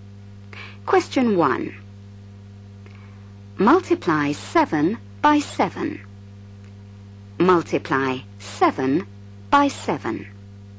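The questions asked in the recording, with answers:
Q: Multiply 7 by 7.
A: 49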